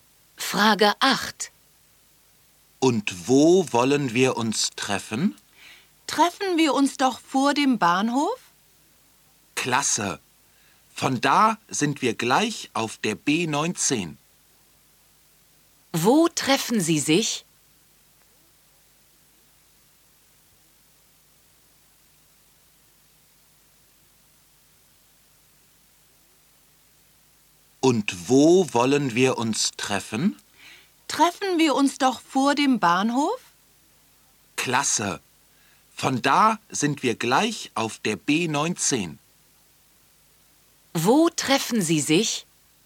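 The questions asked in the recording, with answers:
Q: Wo treffen Sie sich?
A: Vor dem Bahnhof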